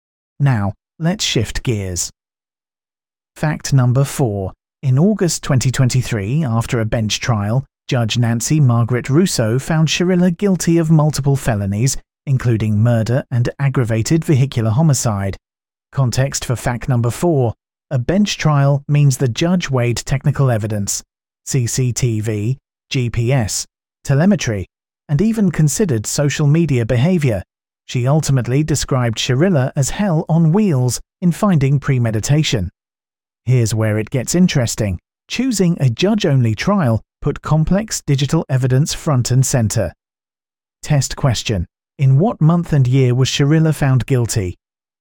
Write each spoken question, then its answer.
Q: In what month and year was Shirilla found guilty?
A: Correct answer, August 2023.